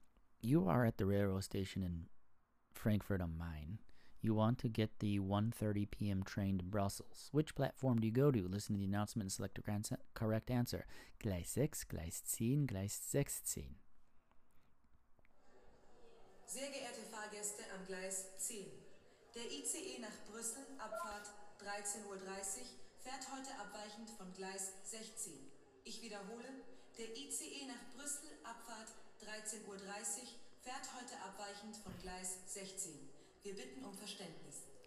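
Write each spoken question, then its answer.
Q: Which platform do you go to?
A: C: Gleis 16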